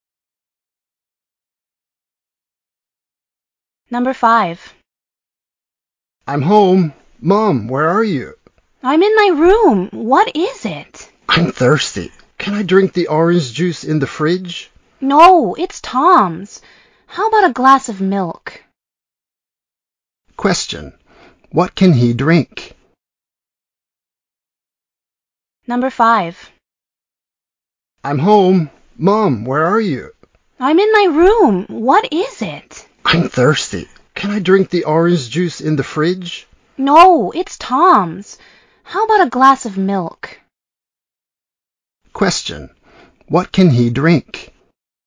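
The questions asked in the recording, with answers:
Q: What can he drink?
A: A glass of milk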